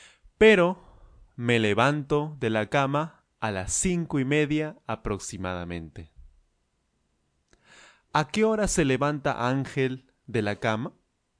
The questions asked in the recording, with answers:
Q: ¿A qué hora se levanta Ángel de la cama?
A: Ángel se levanta de la cama a las cinco y media aproximadamente.